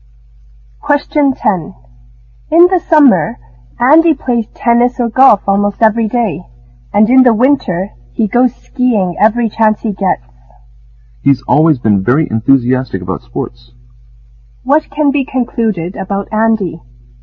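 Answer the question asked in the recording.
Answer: He is very enthusiastic about sports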